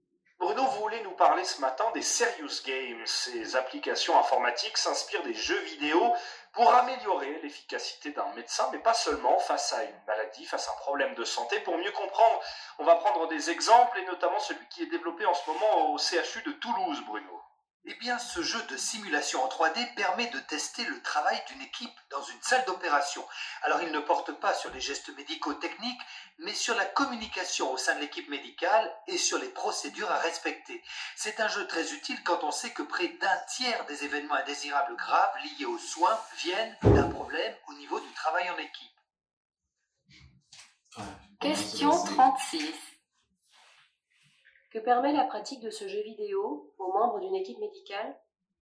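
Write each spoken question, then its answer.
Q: Que permet la pratique de ce jeu vidéo aux membres d'une équipe médicale ?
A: Améliorer la communication au sein de l'équipe et le respect des procédures en salle d'opération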